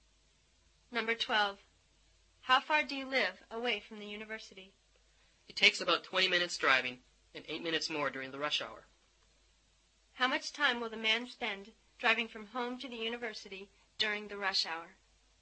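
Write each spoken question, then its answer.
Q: How much time will the man spend driving from home to the university during the rush hour?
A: 28 minutes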